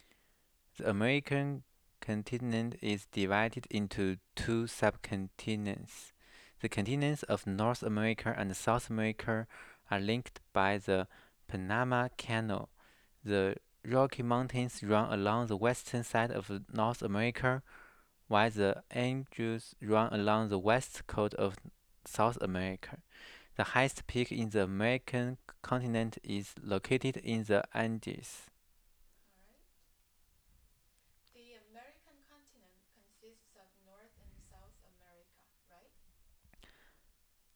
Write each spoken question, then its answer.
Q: The American continent consists of North and South America, right?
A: Yeah, the American continents combine North America and South America.